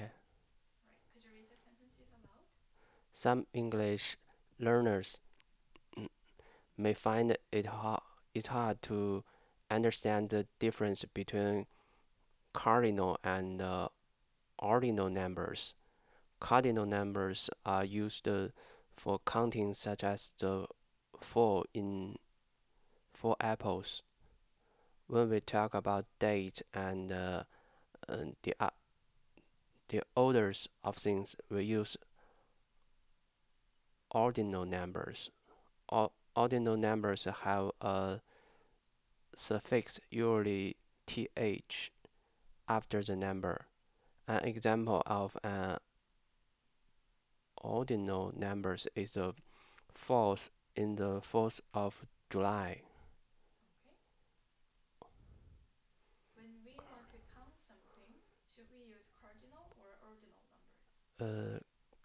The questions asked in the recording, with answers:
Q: When we want to count something, should we use cardinal or ordinal numbers?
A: Use cardinal numbers.